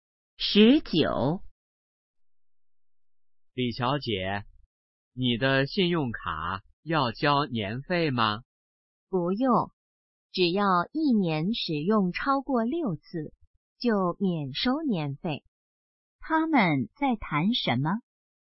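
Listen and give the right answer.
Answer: 信用卡年费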